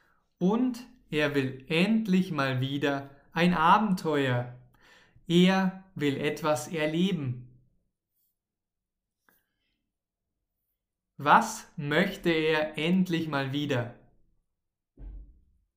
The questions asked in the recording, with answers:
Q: Was möchte er endlich mal wieder?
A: Ein Abenteuer. Ja, er will endlich mal wieder ein Abenteuer.